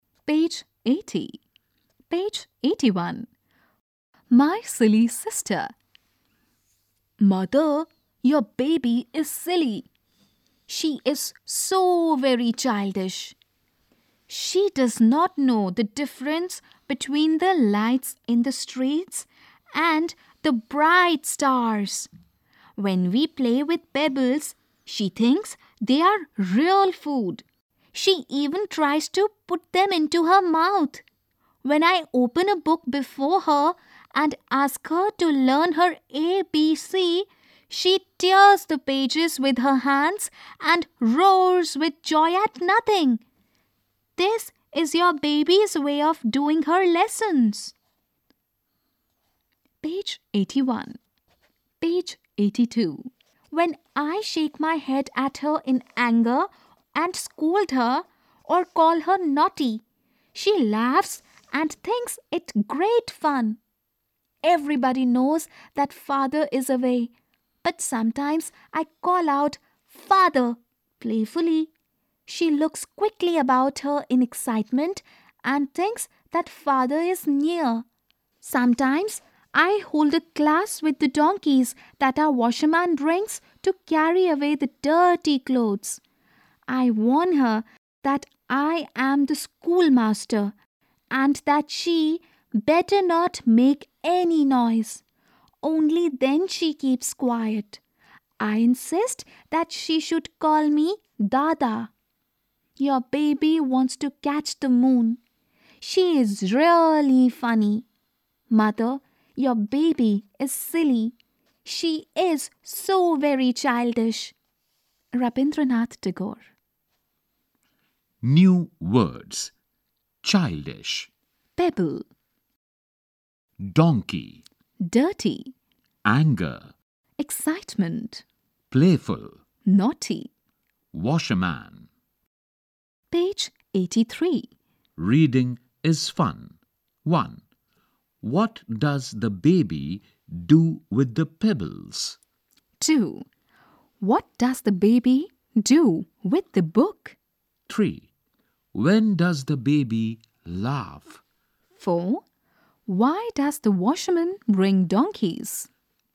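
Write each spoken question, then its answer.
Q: What does the baby do with the pebbles?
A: She thinks they are real food and tries to put them into her mouth.

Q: What does the baby do with the book?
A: She tears the pages with her hands and roars with joy.

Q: When does the baby laugh?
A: When her sister shakes her head at her in anger, scolds her or calls her naughty.

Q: Why does the washerman bring donkeys?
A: To carry away the dirty clothes.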